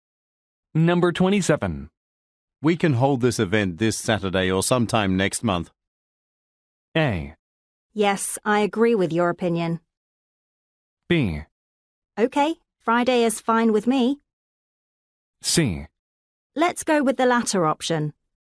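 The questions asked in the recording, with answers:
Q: We can hold this event this Saturday or sometime next month.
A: C: Let's go with the latter option.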